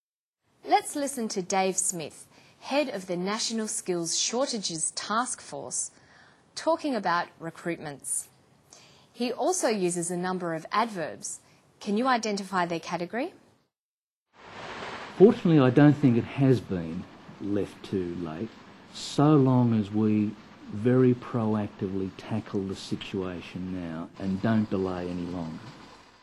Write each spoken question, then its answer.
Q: Can you identify their category?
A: Proactively is an adverb of manner, which expresses how something happens or how something is done.